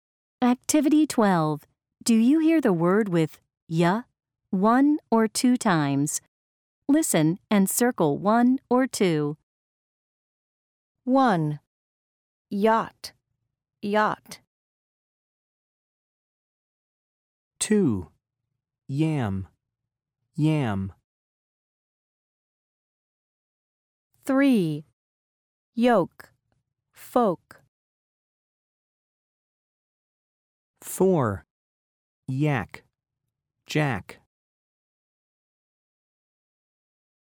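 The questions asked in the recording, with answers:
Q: Yacht, yacht.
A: two

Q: Yam, yam.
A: two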